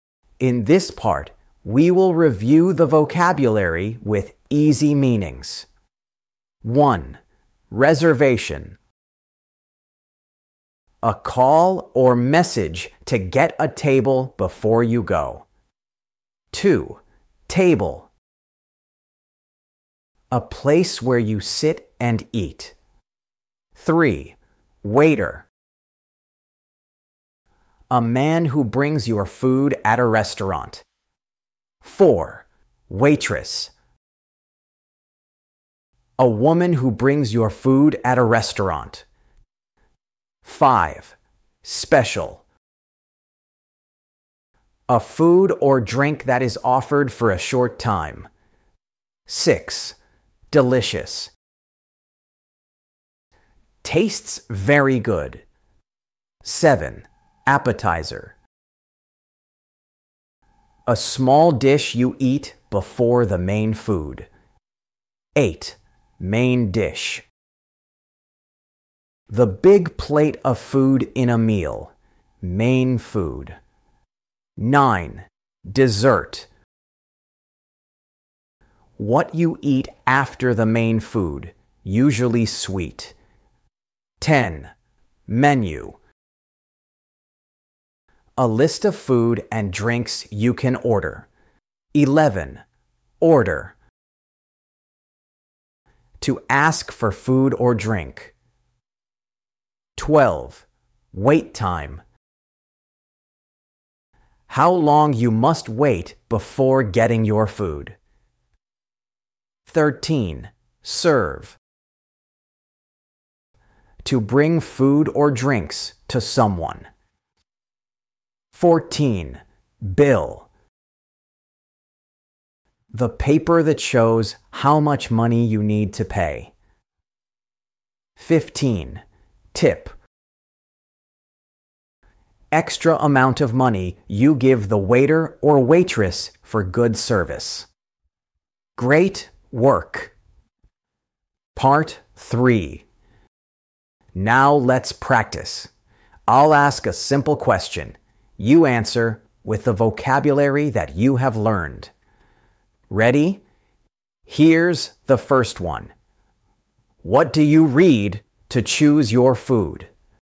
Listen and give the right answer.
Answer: Menu. Yes, the menu helps you decide what to eat.